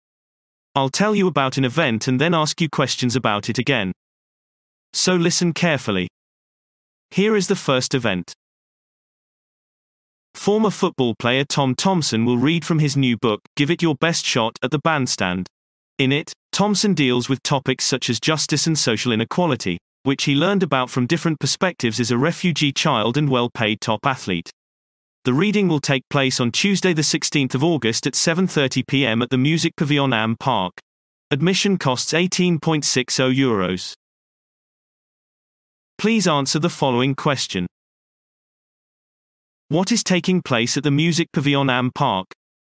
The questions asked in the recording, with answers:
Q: What is taking place at the Music Pavilion Am Park?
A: Former football player Tom Thompson will read from his new book, Give It Your Best Shot, at the bandstand, addressing issues of justice and social inequality.